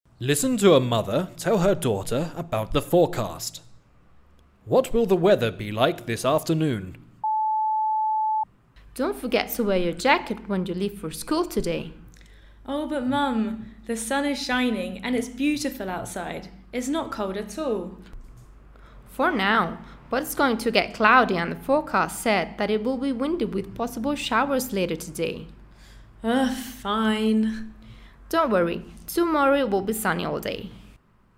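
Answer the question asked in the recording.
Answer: Cloudy and windy, with possible showers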